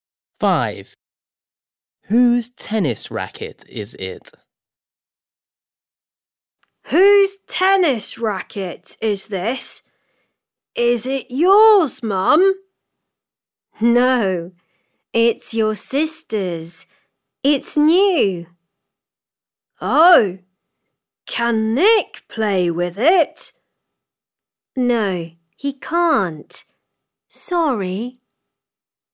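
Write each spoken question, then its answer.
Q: Whose tennis racket is it?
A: his sister's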